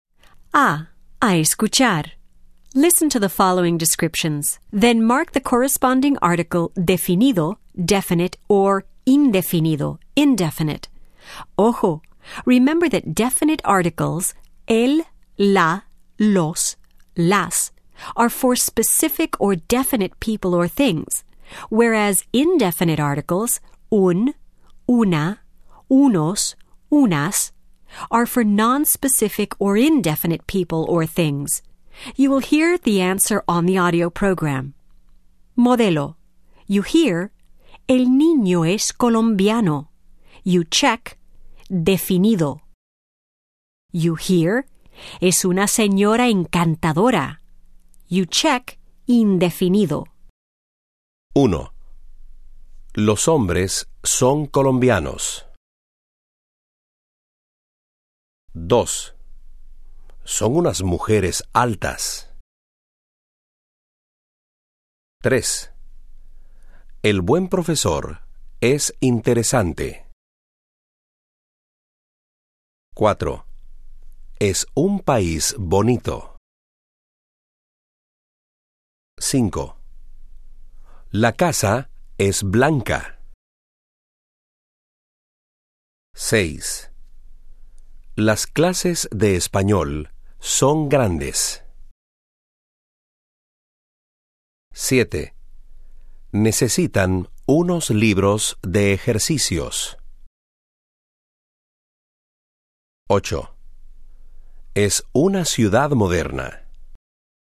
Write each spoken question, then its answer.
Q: Los hombres son colombianos.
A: Definido.

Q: Son unas mujeres altas.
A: Indefinido.

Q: El buen profesor es interesante.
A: Definido.

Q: Es un país bonito.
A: Indefinido.

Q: La casa es blanca.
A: Definido.

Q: Las clases de español son grandes.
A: Definido.

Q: Necesitan unos libros de ejercicios.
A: Indefinido.

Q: Es una ciudad moderna.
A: Indefinido.